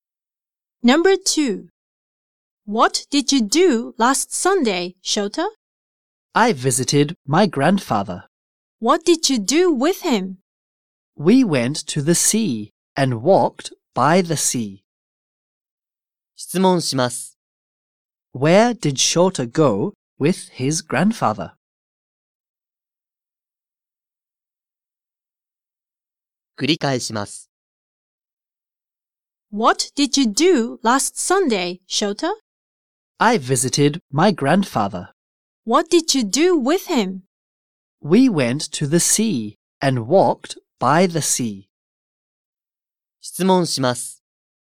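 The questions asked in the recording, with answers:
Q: Where did Shota go with his grandfather?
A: To the sea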